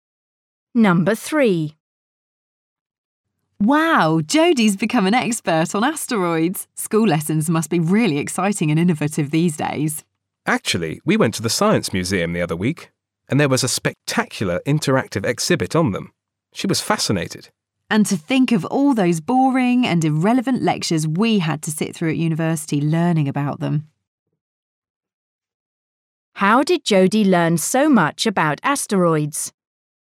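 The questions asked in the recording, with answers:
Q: How did Jodie learn so much about asteroids?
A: at an interactive exhibit at the Science Museum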